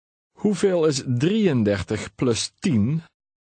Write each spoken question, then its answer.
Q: Hoeveel is 33 plus 10?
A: 43.